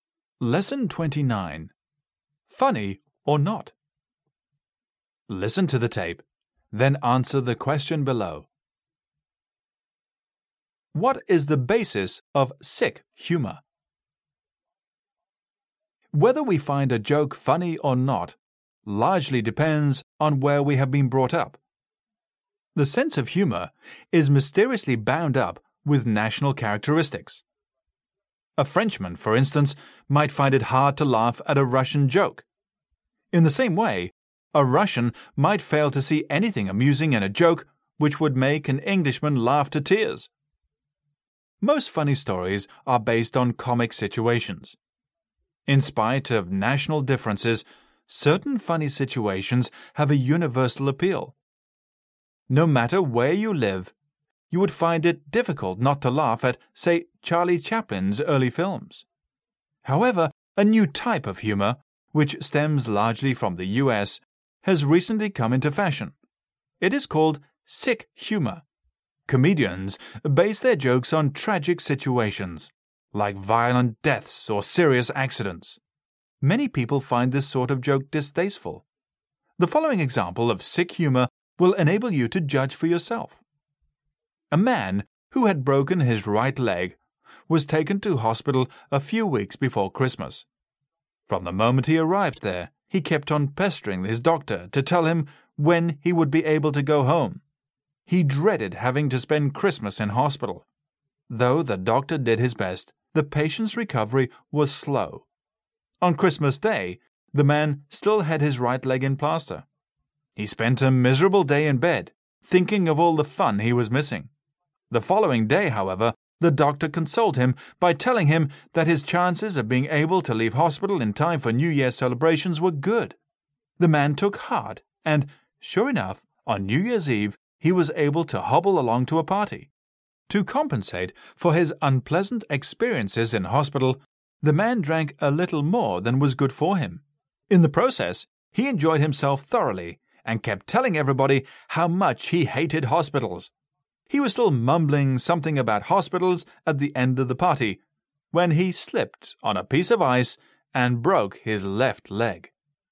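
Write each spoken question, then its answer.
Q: What is the basis of sick humor?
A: Tragic situations, like violent deaths or serious accidents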